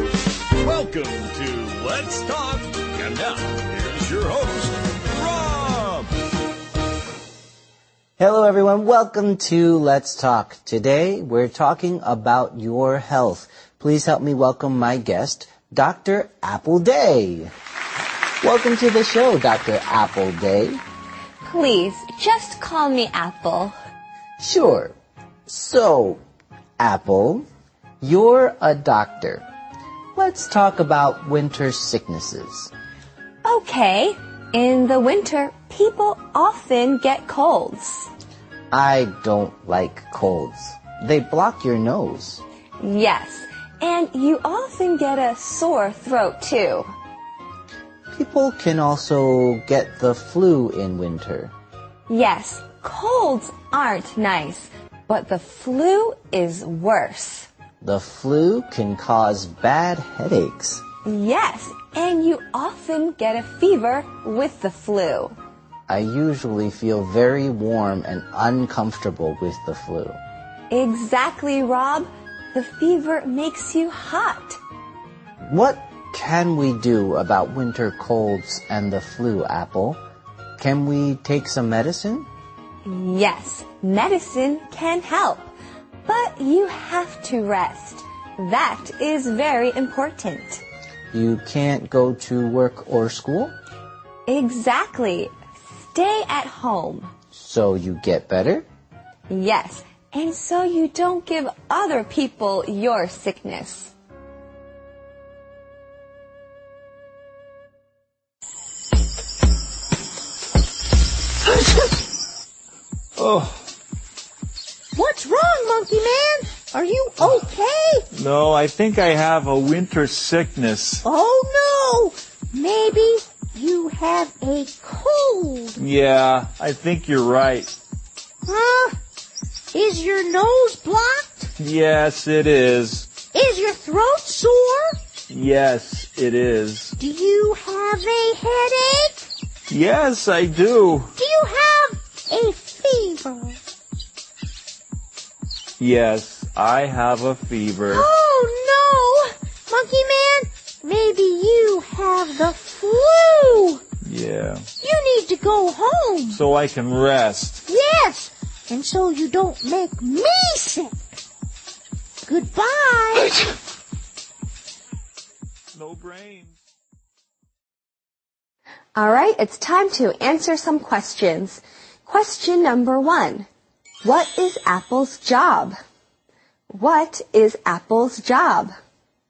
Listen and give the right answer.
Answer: Apple is a doctor.